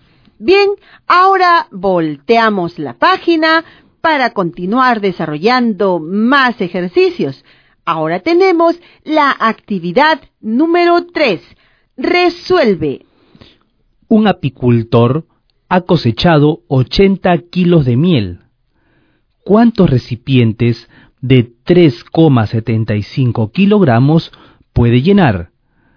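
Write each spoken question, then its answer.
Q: ¿Cuántos recipientes de 3,75 kilogramos puede llenar?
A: 21 recipientes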